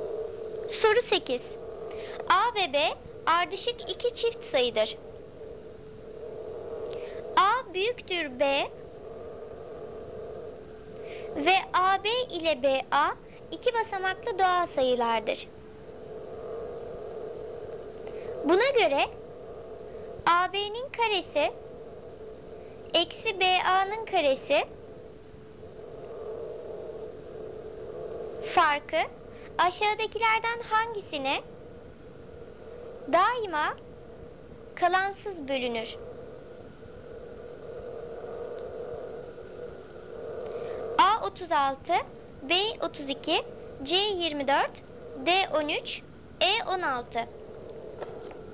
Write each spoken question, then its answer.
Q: farkı aşağıdakilerden hangisine daima kalansız bölünür?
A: Doğru cevap A 36.